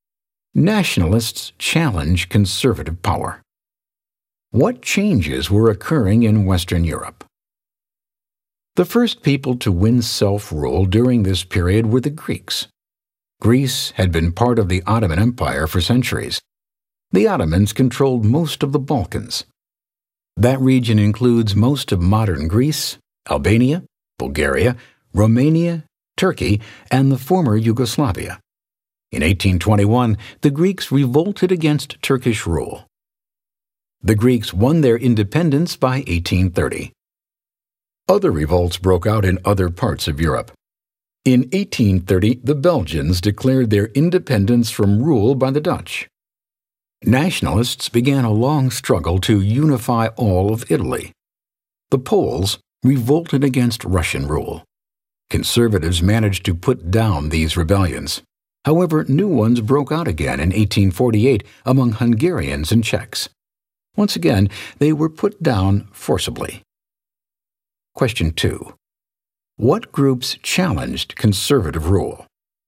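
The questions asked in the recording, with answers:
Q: What groups challenged conservative rule?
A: Nationalists such as the Greeks, Belgians, Italians, Poles, Hungarians and Czechs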